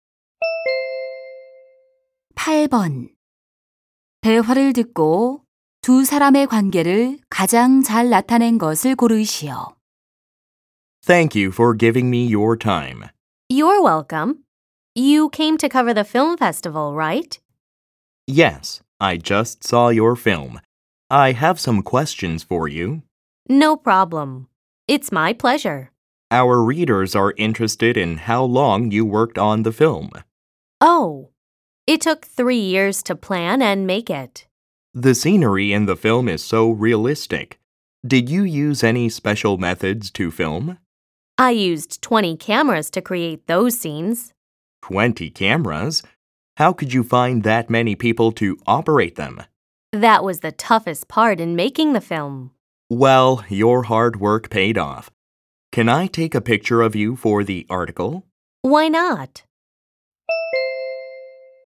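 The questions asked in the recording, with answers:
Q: 대화를 듣고 두 사람의 관계를 가장 잘 나타낸 것을 고르시오.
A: 기자 - 영화감독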